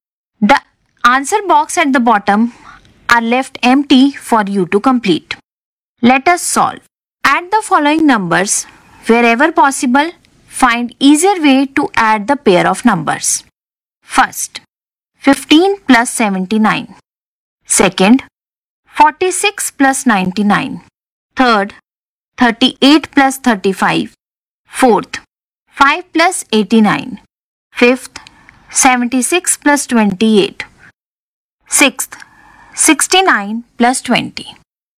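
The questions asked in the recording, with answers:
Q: First, 15 plus 79.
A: 94

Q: Second, 46 plus 99.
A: 145

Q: Third, 38 plus 35.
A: 73

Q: Fourth, 5 plus 89.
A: 94

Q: Fifth, 76 plus 28.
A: 104

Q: Sixth, 69 plus 20.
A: 89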